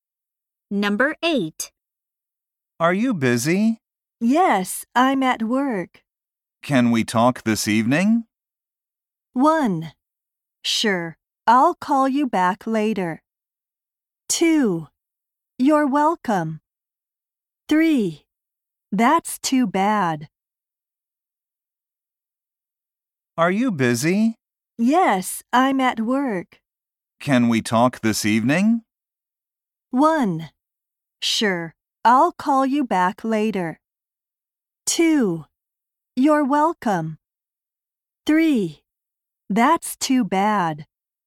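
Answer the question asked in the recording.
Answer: 1: Sure, I'll call you back later.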